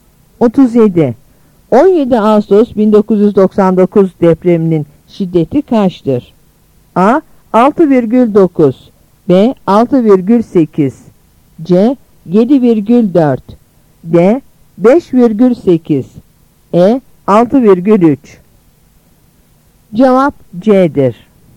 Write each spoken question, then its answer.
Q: 17 Ağustos 1999 depreminin şiddeti kaçtır?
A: Cevap C'dir.